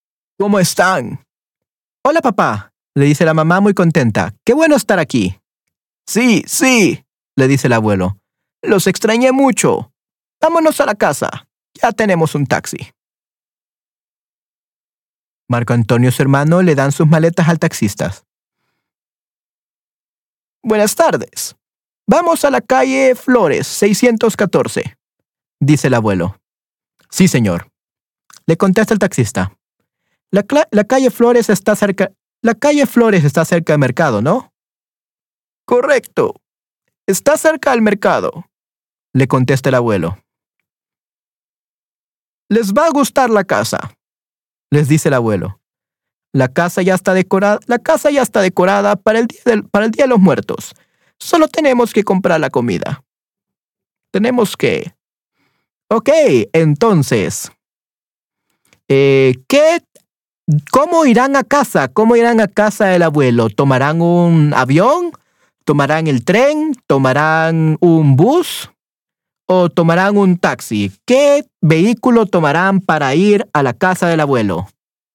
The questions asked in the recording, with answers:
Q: ¿Qué vehículo tomarán para ir a la casa del abuelo?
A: Un taxi.